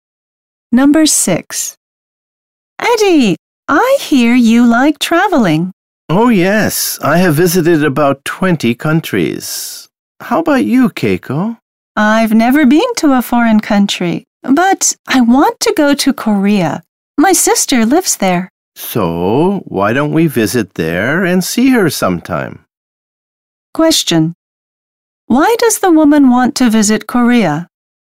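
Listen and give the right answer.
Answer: Because her sister lives there.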